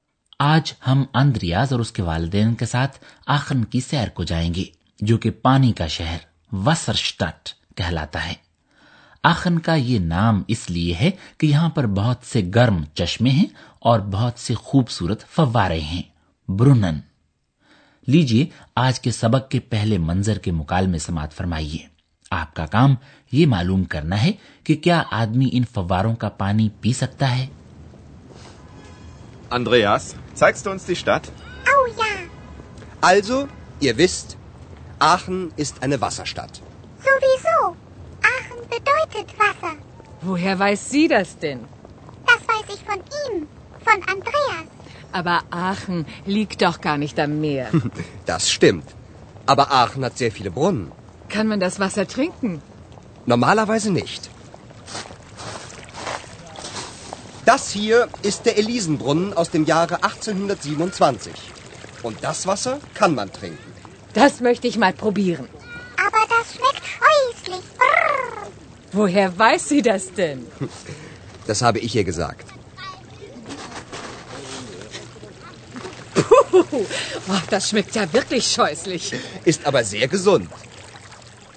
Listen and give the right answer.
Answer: مطلب یہ کہ عام طور پر آدمی ان فواروں کا پانی نہیں پی سکتا لیکن ایک مخصوص فوارے ایلیزن فوارے سے نکلنے والا پانی آدمی پی سکتا ہے